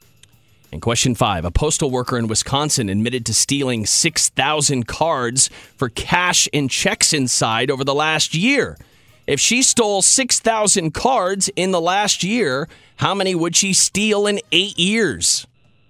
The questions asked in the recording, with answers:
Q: If she stole 6,000 cards in the last year, how many would she steal in 8 years?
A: 48,000.